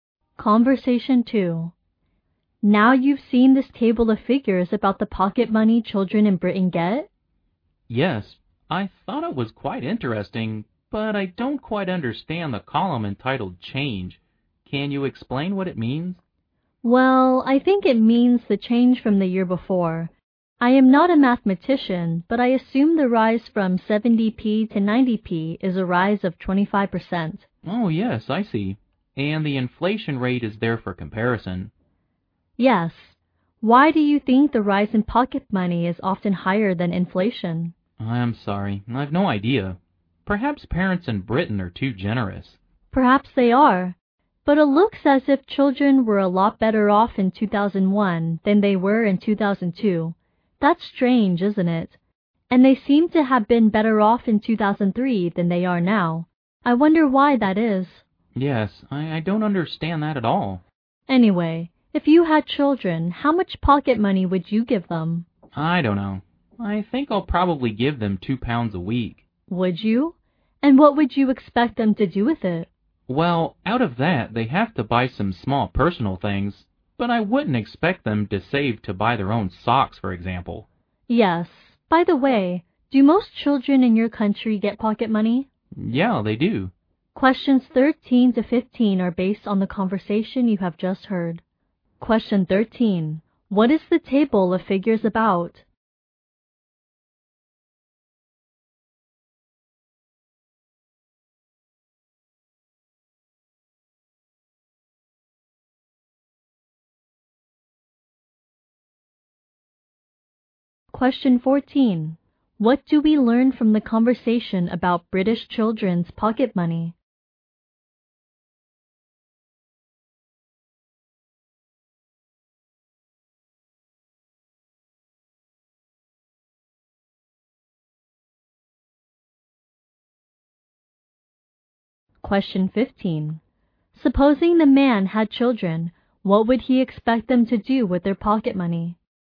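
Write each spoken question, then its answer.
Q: What is the table of figures about?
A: The pocket money children in Britain get.

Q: Supposing the man had children, what would he expect them to do with their pocket money?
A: Buy some small personal things.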